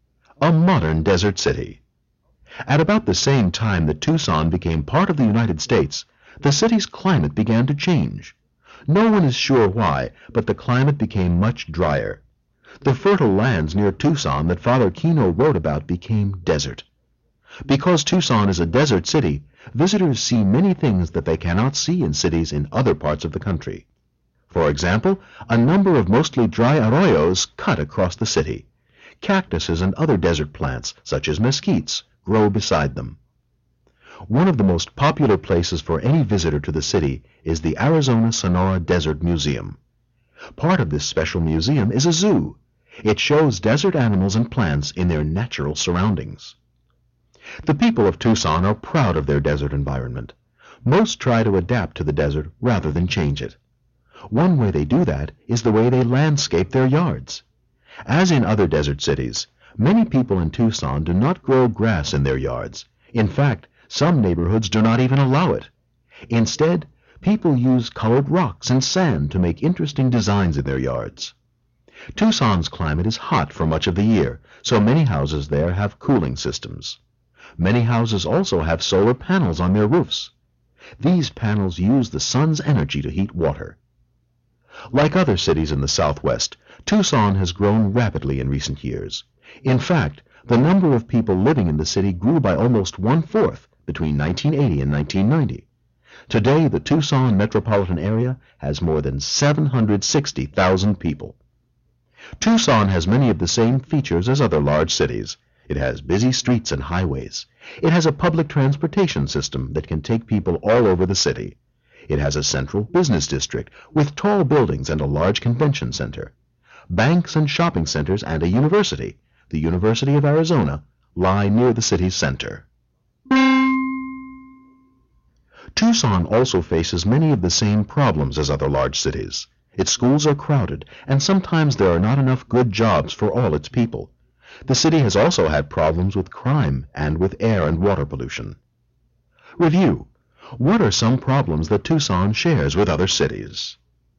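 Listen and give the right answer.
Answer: Crowded schools, not enough good jobs, crime, and air and water pollution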